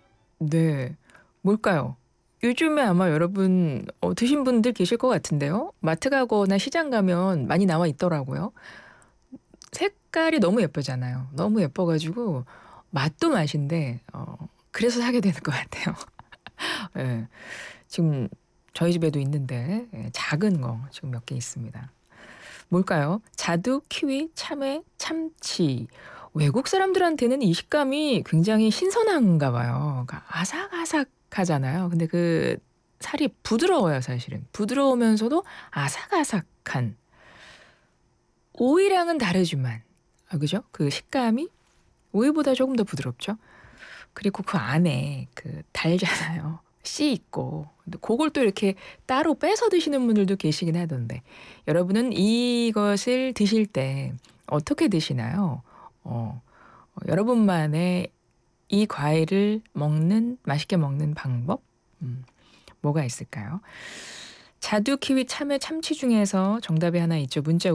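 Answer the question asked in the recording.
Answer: 참외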